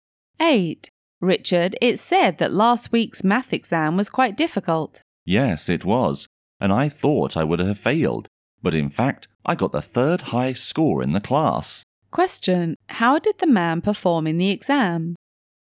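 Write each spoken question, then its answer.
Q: How did the man perform in the exam?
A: Very well; he got the third highest score in the class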